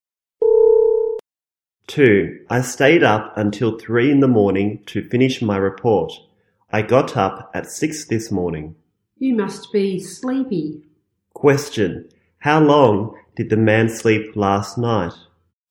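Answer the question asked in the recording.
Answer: Three hours.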